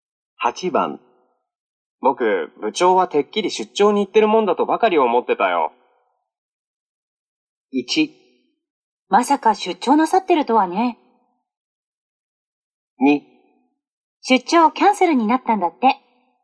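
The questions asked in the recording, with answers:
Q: 僕、部長はてっきり出張に行ってるもんだとばかり思ってたよ。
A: 2: 出張キャンセルになったんだって。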